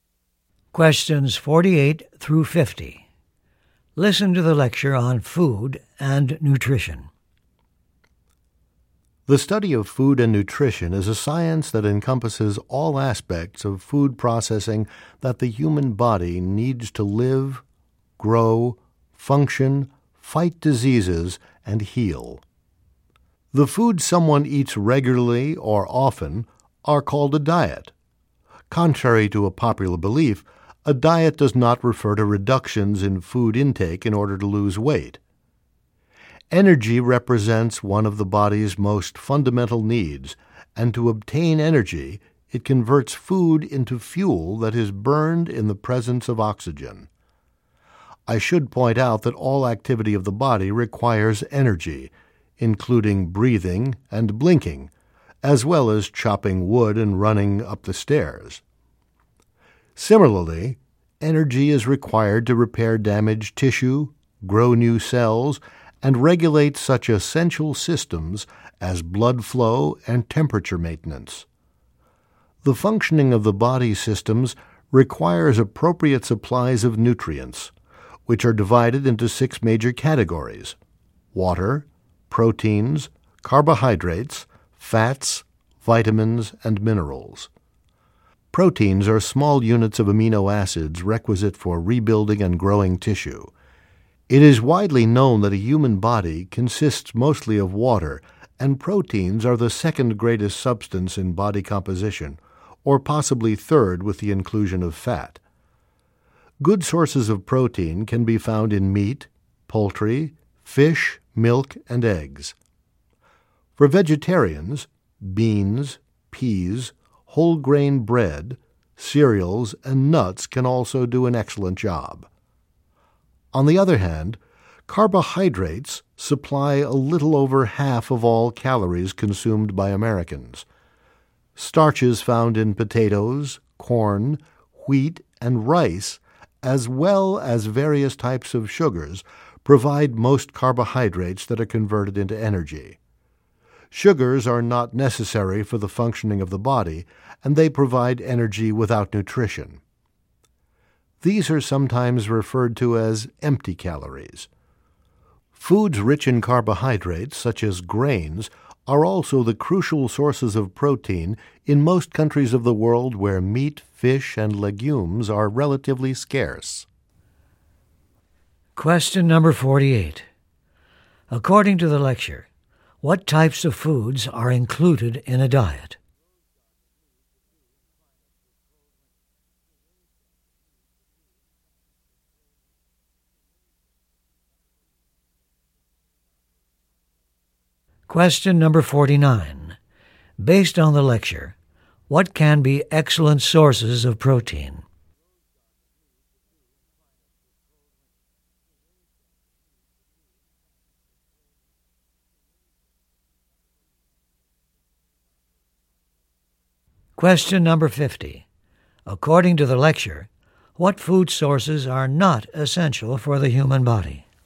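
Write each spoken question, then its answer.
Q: According to the lecture, what types of foods are included in a diet?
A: The foods someone eats regularly or often

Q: Based on the lecture, what can be excellent sources of protein?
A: Meat, poultry, fish, milk and eggs; for vegetarians beans, peas, whole grain bread, cereals and nuts

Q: According to the lecture, what food sources are not essential for the human body?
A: Sugars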